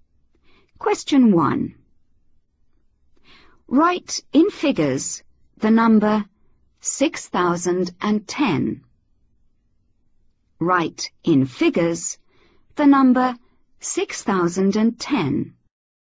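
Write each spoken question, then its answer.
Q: Write in figures the number 6010.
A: 6010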